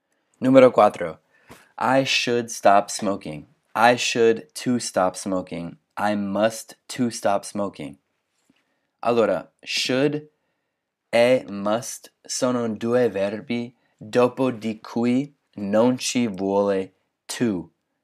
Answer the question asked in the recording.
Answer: Quindi I should stop smoking è giusto, infatti è A.